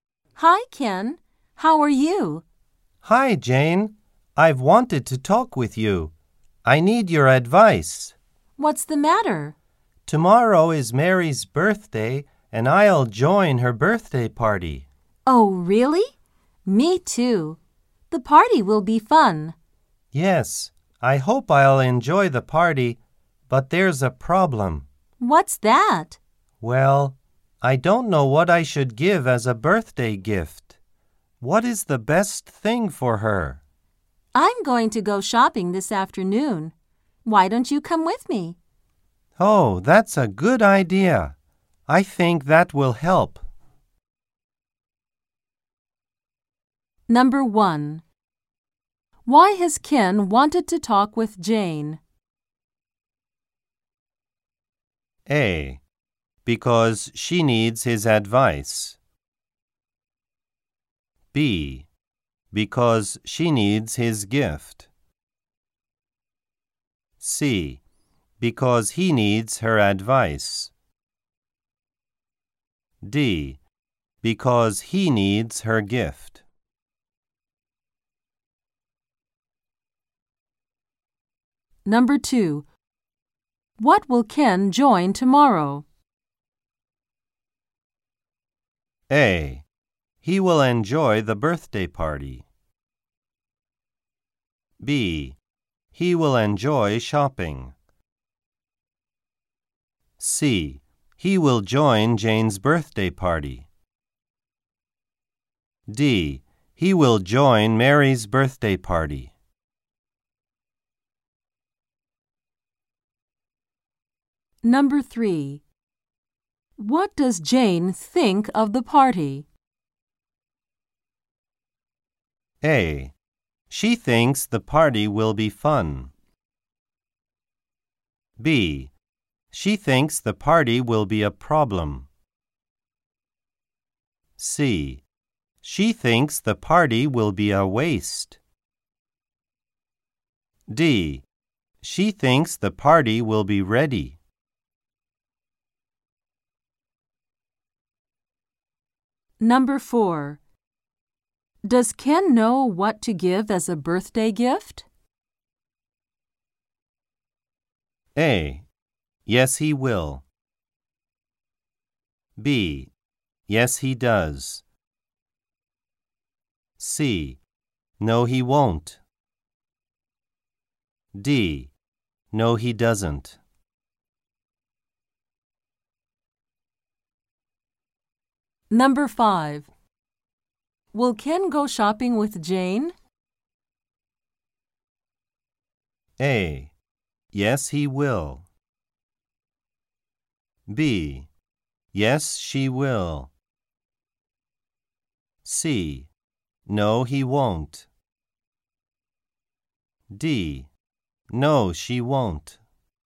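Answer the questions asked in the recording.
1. C: Because he needs her advice.
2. D: He will join Mary's birthday party.
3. A: She thinks the party will be fun.
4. D: No, he doesn't.
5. A: Yes, he will.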